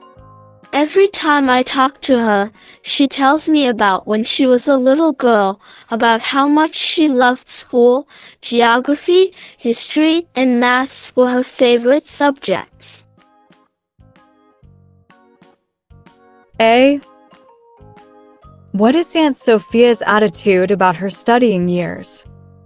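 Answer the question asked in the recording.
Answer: Positive; she loved school.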